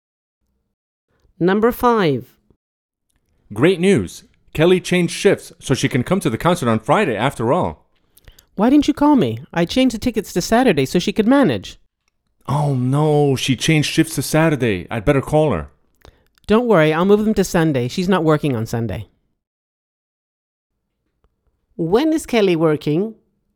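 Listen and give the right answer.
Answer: Saturday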